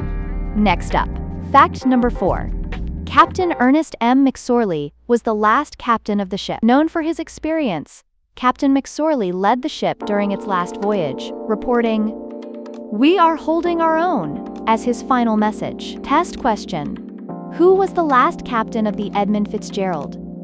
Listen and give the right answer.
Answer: Ernest M.